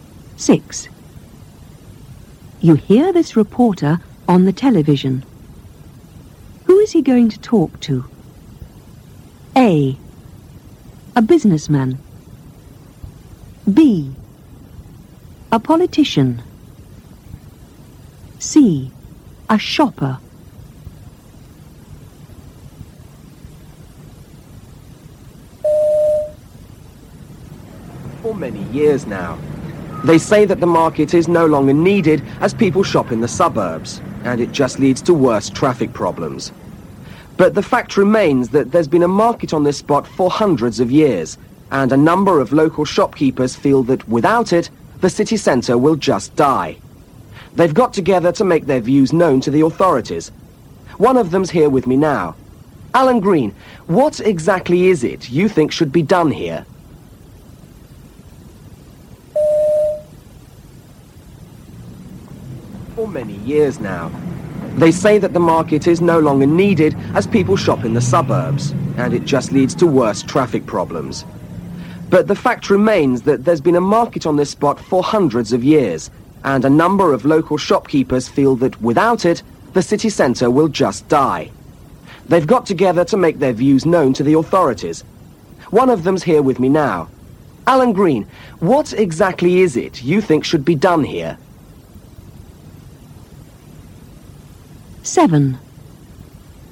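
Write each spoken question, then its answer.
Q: Who is he going to talk to? A. A businessman. B. A politician. C. A shopper.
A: A: A businessman.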